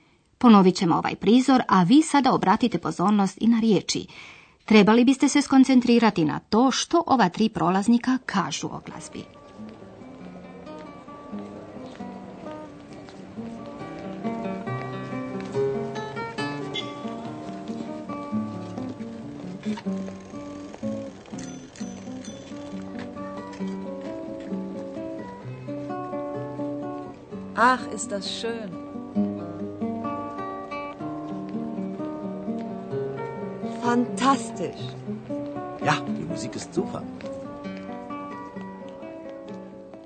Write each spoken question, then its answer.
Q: Trebali biste se skoncentrirati na to što ova tri prolaznika kažu o glazbi.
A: Ovo troje je oduševljeno glazbom.